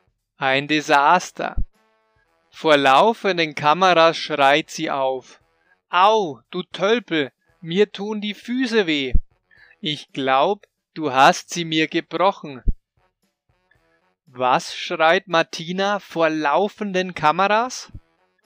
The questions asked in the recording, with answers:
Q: Was schreit Martina vor laufenden Kameras?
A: Sie schreit Au, du Tölpel, mir tun die Füße weh.